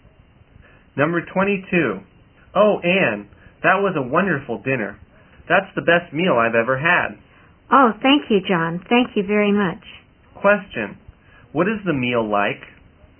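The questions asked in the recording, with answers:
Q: What is the meal like?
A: Wonderful, the best he has ever had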